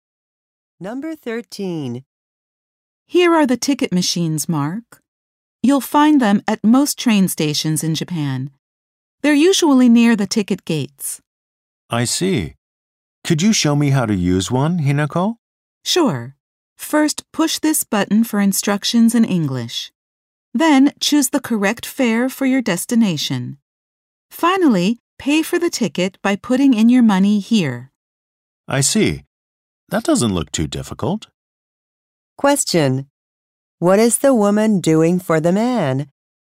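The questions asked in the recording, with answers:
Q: What is the woman doing for the man?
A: Showing him how to use a ticket machine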